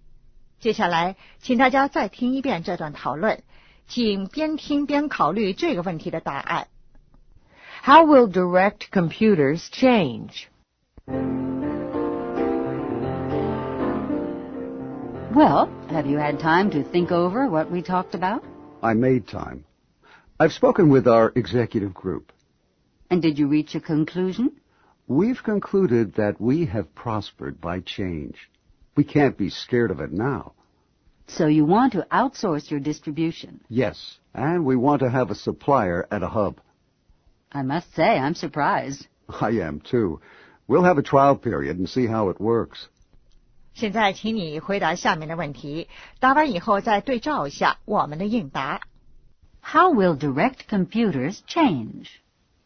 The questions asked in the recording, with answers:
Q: How will direct computers change?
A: They will outsource the distribution and have a supplier at the hub.